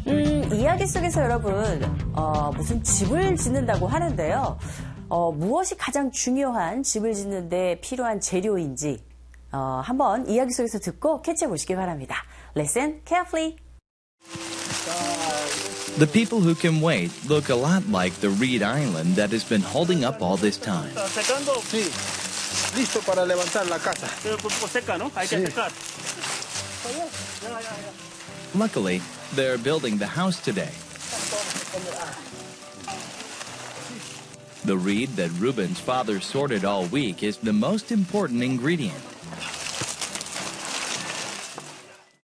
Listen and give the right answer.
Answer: 일주일 내내 분류한 갈대, 그것이 바로 주재료인 거죠.